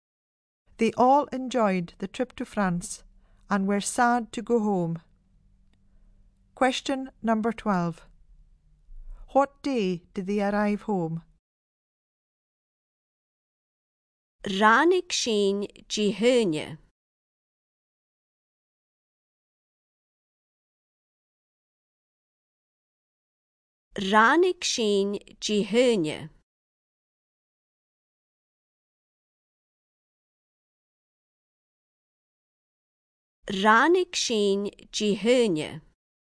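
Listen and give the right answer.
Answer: Monday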